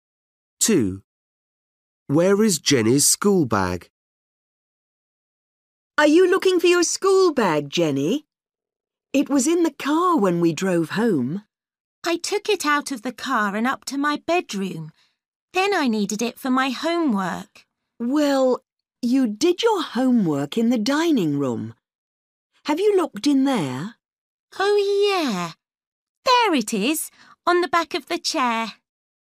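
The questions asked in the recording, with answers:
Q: Where is Jenny's school bag?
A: On the back of the chair in the dining room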